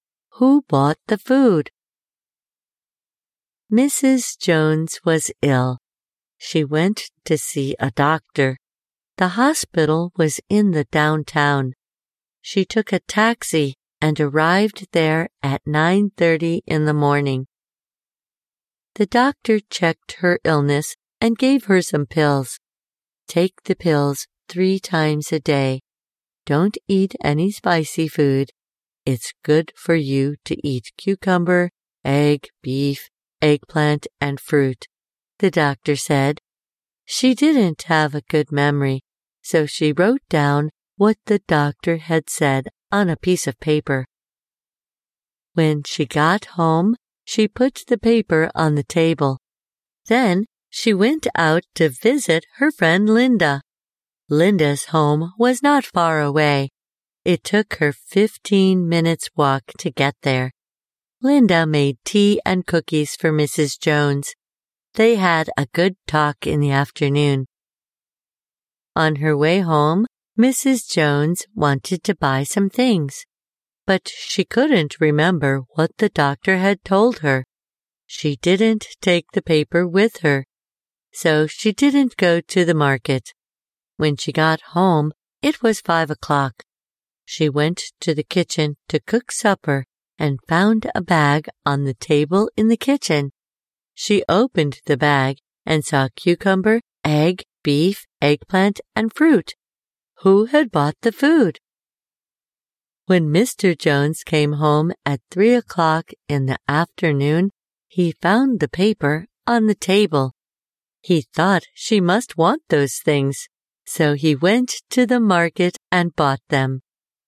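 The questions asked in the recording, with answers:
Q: Who bought the food?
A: Mr. Jones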